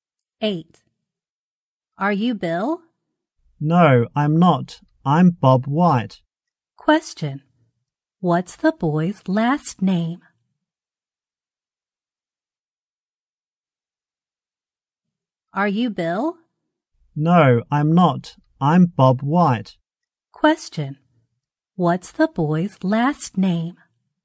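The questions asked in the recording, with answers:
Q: What's the boy's last name?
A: White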